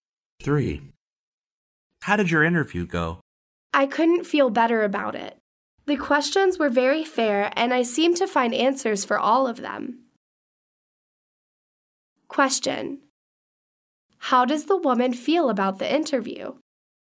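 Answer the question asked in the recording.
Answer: She feels very good about it.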